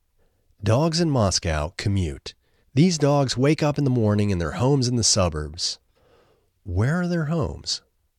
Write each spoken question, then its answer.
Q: Where are their homes?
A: Their homes are in the suburbs.